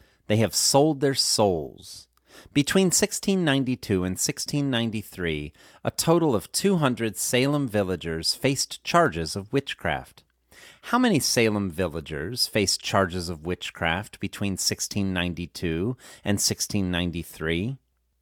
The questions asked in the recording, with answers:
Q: How many Salem villagers faced charges of witchcraft between 1692 and 1693?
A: 200 Salem villagers faced charges of witchcraft between 1692 and 1693.